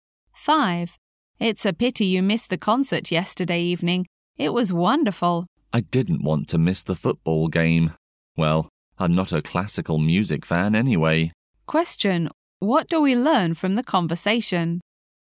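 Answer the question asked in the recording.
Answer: The man missed the concert to watch a football game; he isn't a classical music fan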